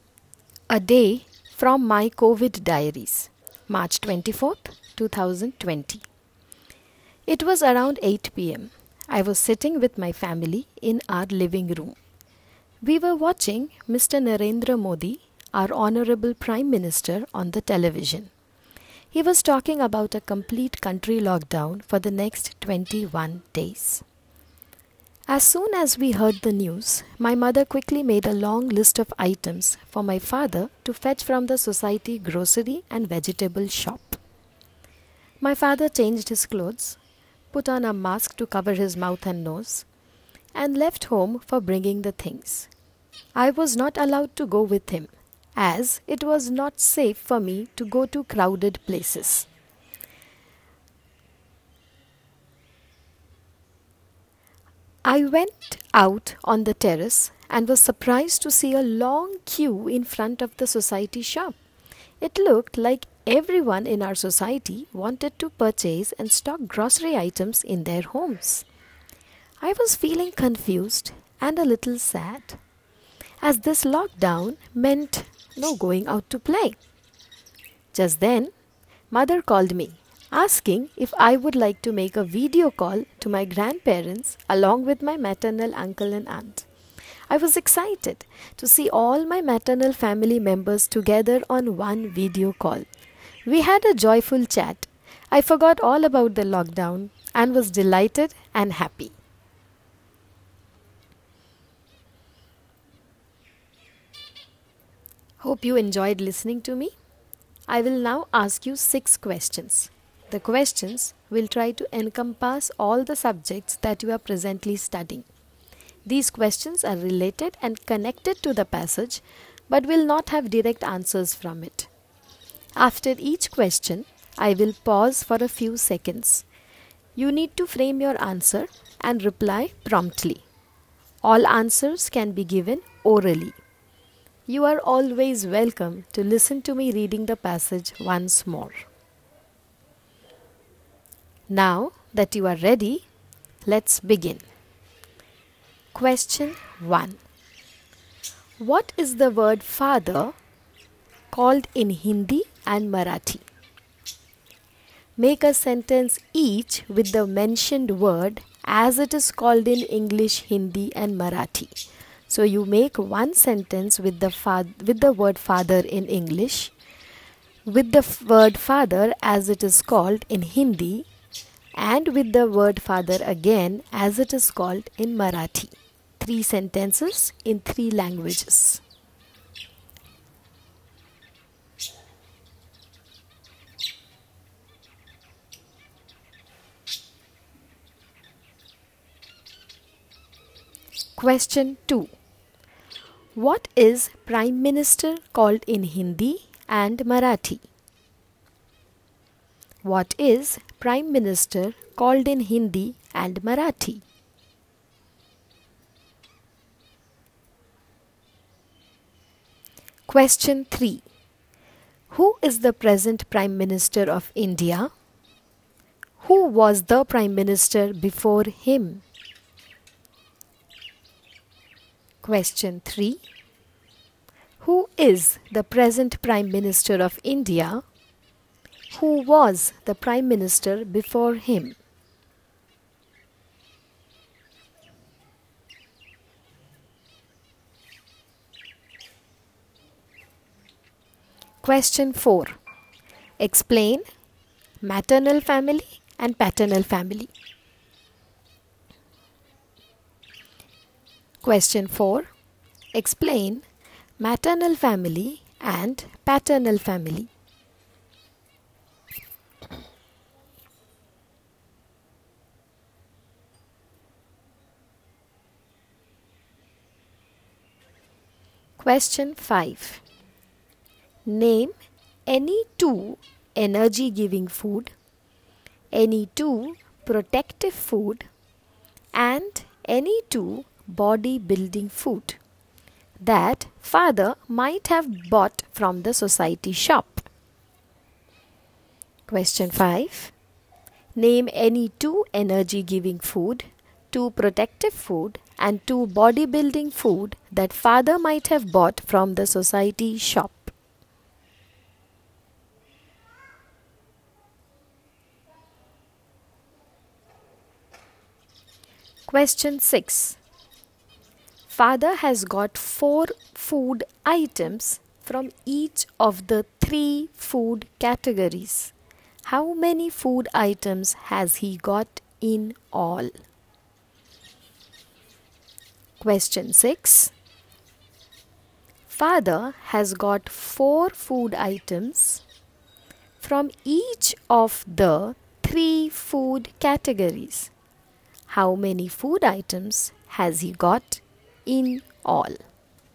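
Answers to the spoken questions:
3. Mr. Narendra Modi
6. 12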